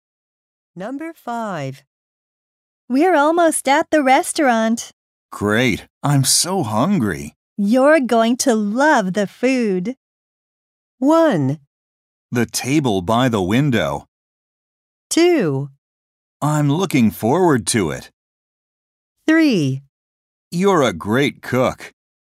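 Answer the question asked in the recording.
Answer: 2: I'm looking forward to it.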